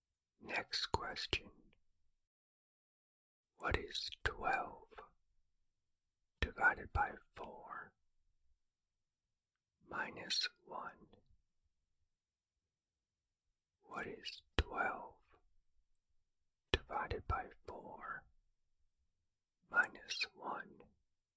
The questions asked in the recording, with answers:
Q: What is 12 divided by 4 minus 1?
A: The answer is 2.